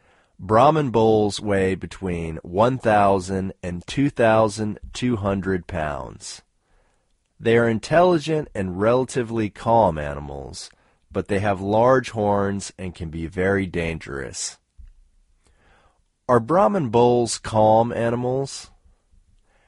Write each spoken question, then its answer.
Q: Are Brahmin bulls calm animals?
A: Yes, they are calm animals.